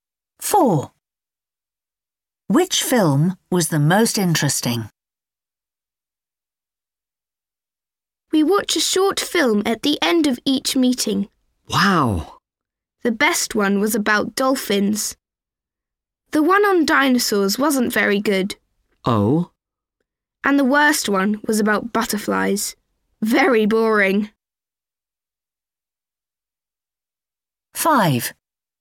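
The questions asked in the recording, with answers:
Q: Which film was the most interesting?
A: the one about dolphins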